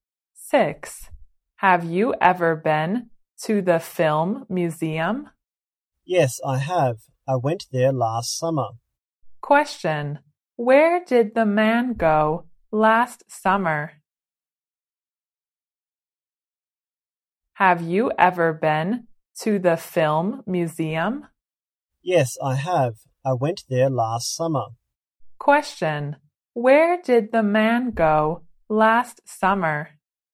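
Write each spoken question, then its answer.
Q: Where did the man go last summer?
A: The film museum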